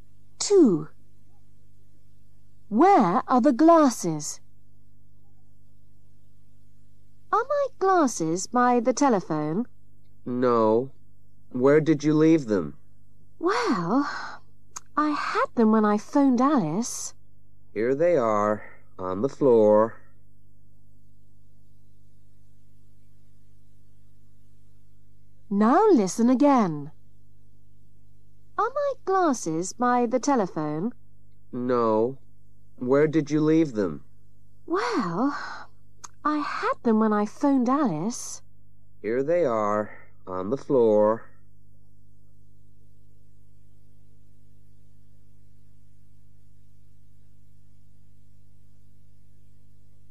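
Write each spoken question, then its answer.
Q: Where are the glasses?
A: On the floor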